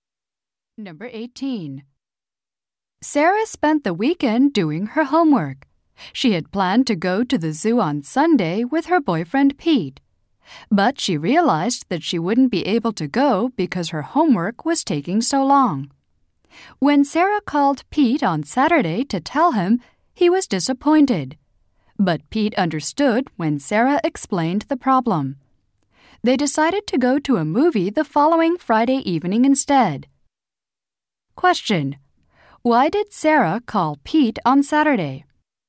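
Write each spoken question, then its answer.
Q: Why did Sarah call Pete on Saturday?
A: To tell him she couldn't go to the zoo because of her homework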